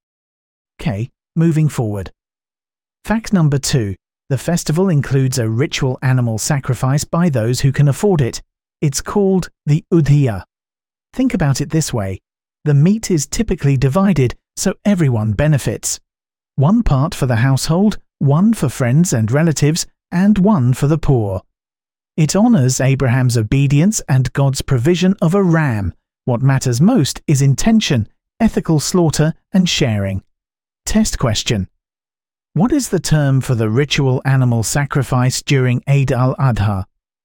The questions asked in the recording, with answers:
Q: What is the term for the ritual animal sacrifice during Eid al-Adha?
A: Udhiyah.